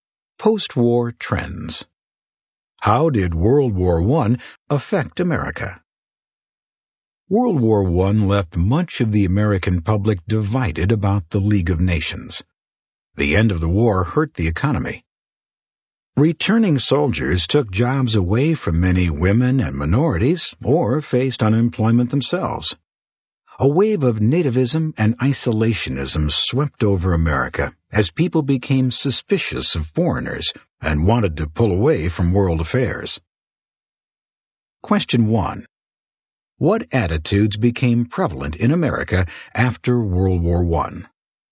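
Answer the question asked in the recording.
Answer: Nativism and isolationism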